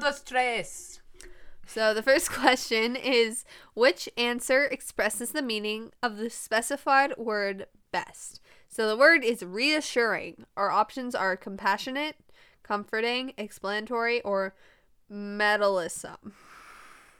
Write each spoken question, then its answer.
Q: which answer expresses the meaning of the specified word best?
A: Comforting.